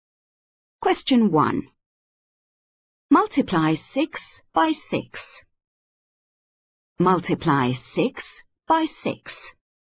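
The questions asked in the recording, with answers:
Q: Multiply 6 by 6.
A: 36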